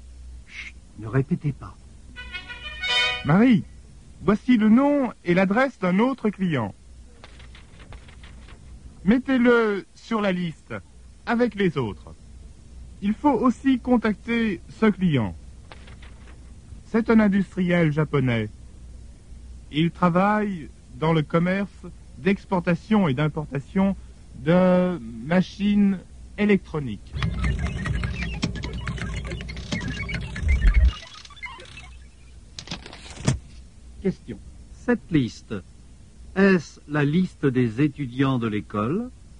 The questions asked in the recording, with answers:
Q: Cette liste, est-ce la liste des étudiants de l'école?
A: Non, ce n'est pas la liste des étudiants de l'école.